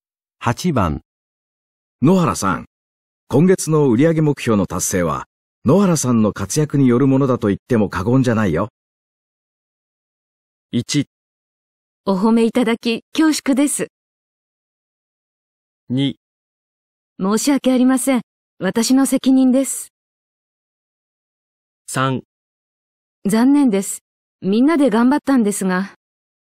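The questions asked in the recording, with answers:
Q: 今月の売上目標の達成は、野原さんの活躍によるものだと言っても過言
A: 1: お褒めいただき恐縮です。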